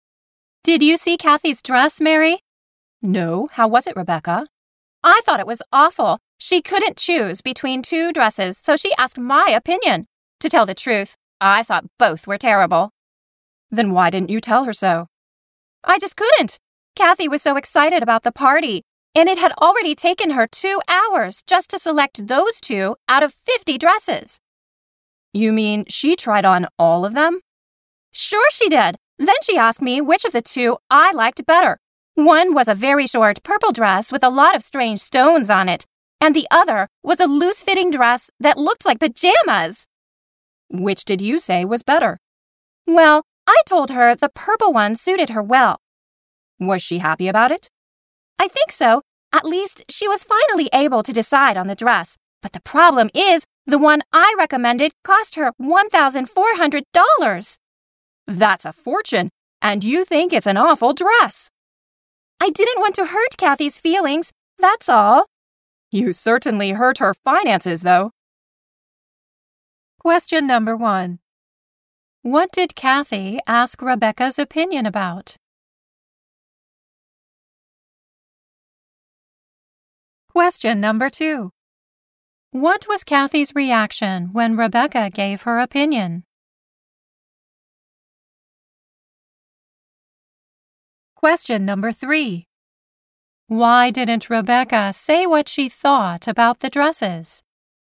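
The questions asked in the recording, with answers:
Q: What did Kathy ask Rebecca's opinion about?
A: Which of two dresses she should choose for the party

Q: What was Kathy's reaction when Rebecca gave her opinion?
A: She seemed happy and finally decided on the dress

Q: Why didn't Rebecca say what she thought about the dresses?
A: She didn't want to hurt Kathy's feelings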